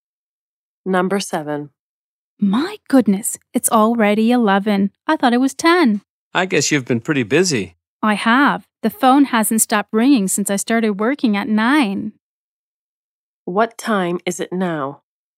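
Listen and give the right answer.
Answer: 11 o'clock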